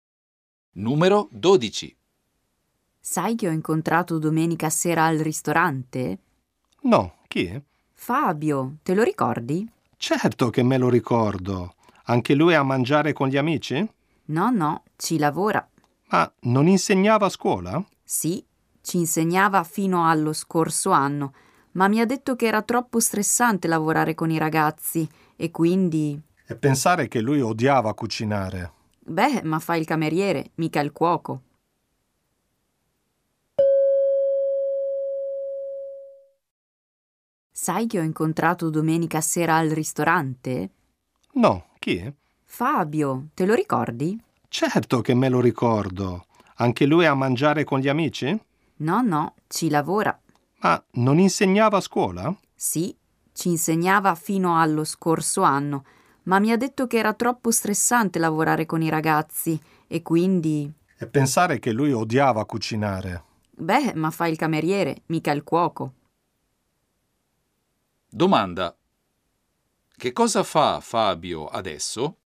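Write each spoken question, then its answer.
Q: Domanda. Che cosa fa Fabio adesso?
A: Il cameriere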